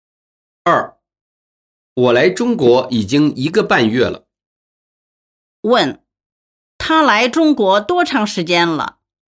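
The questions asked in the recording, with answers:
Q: 他来中国多长时间了?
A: 一个半月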